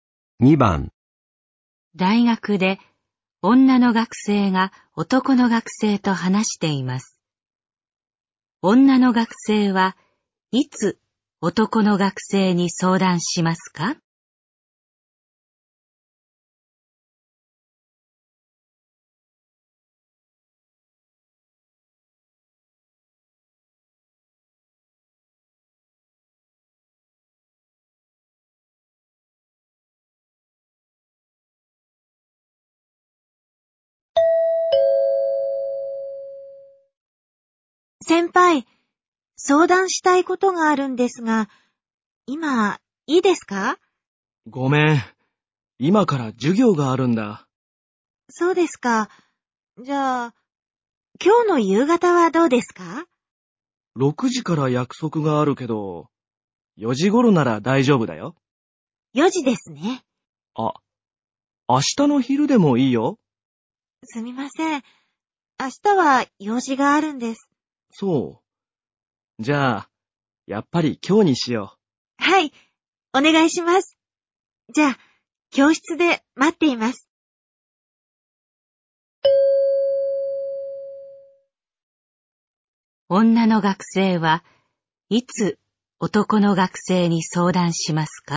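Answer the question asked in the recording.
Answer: 今日の4時頃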